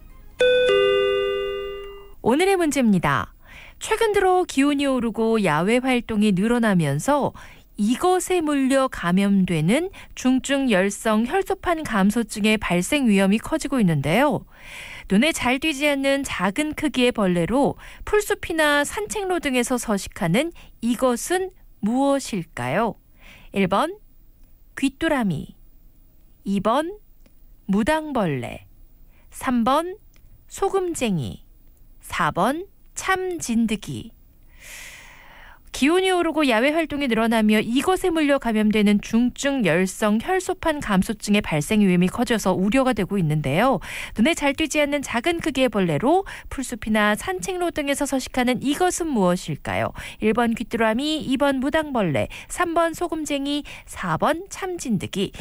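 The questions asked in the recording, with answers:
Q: 눈에 잘 띄지 않는 작은 크기의 벌레로 풀숲이나 산책로 등에서 서식하는 이것은 무엇일까요?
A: 4: 참진드기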